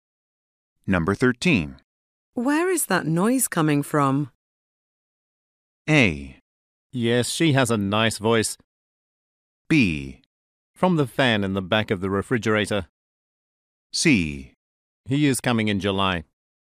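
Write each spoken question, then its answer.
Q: Where is that noise coming from?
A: B: From the fan in the back of the refrigerator.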